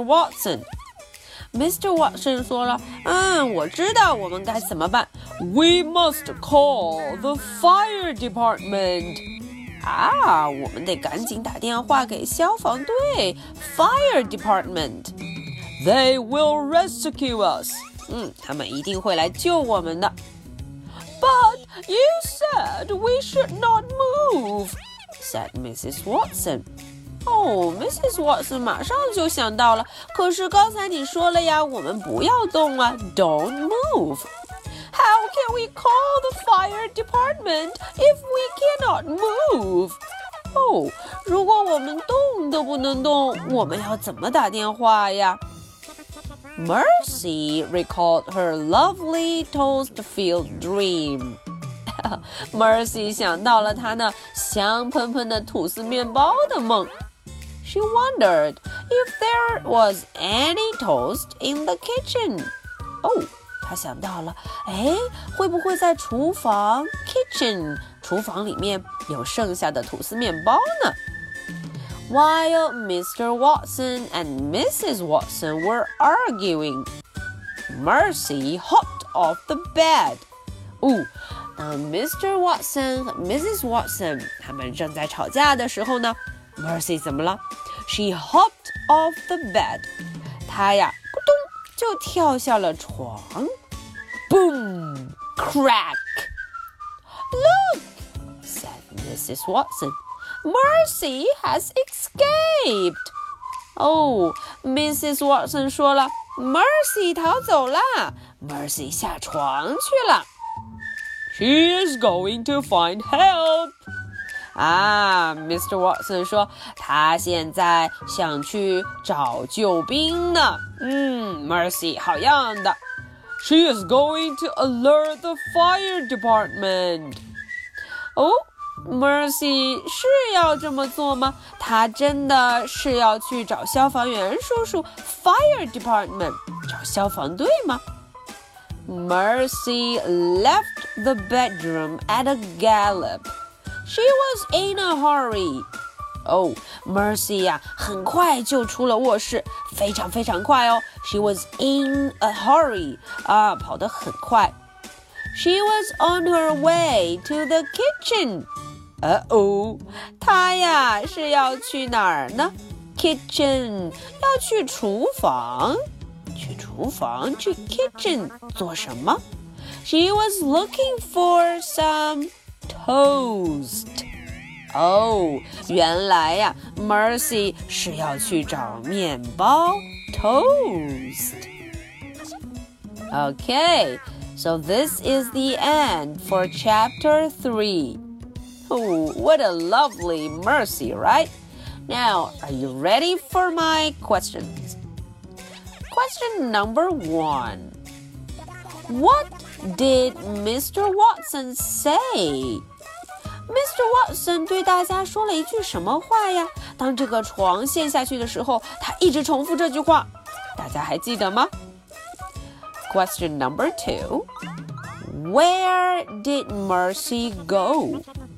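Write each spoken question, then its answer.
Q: Where did Mercy go?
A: To the kitchen (to look for toast).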